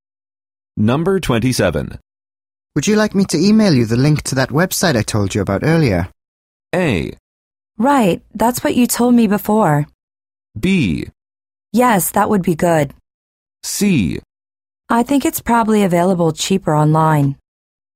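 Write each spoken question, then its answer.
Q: Would you like me to email you the link to that website I told you about earlier?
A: B: Yes, that would be good.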